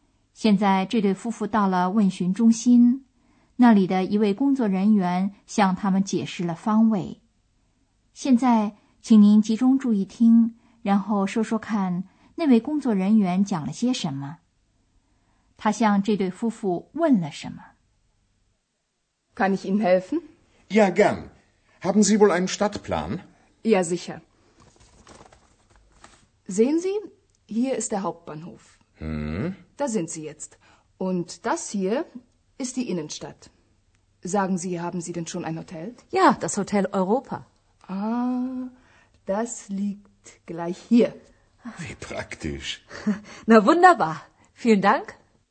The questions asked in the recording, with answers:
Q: 他向这对夫妇问了什么。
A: 他问他们是否已经找到了旅馆